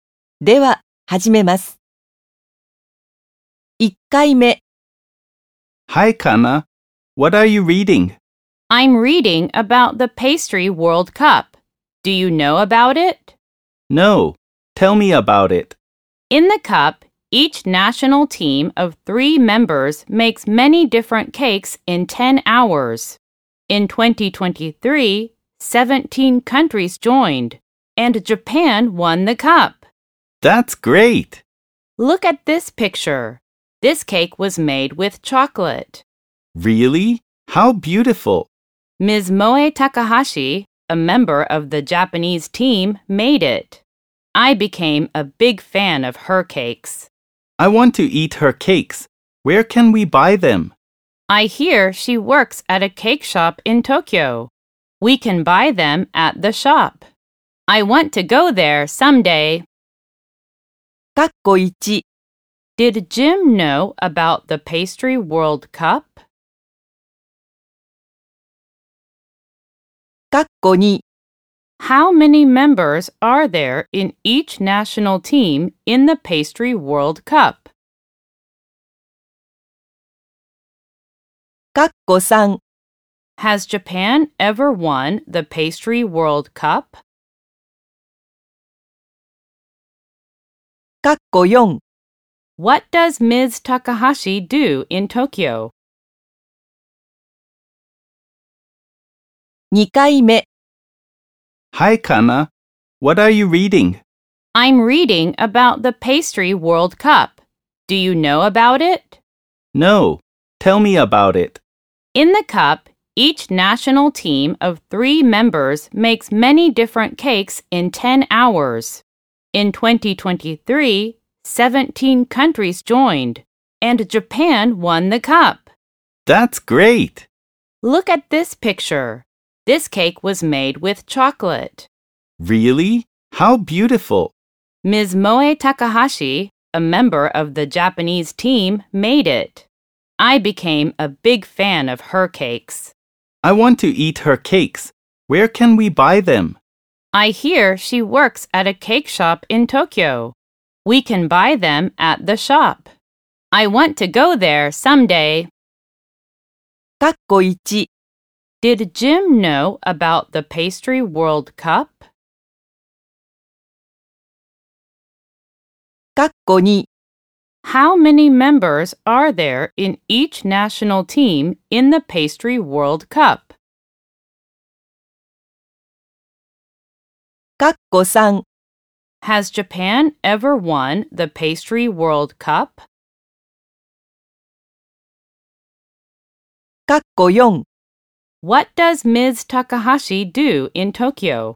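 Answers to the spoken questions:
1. No, he didn't
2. Three
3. Yes, it has
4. She works at a cake shop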